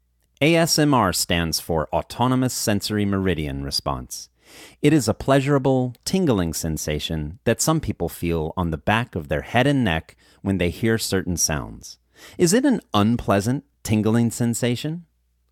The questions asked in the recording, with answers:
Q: Is it an unpleasant, tingling sensation?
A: No, it is not an unpleasant tingling sensation.